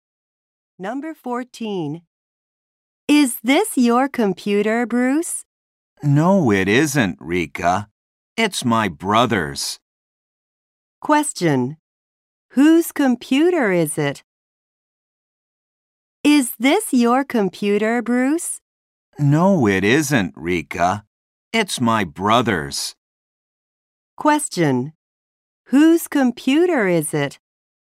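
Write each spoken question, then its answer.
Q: Whose computer is it?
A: Bruce's brother's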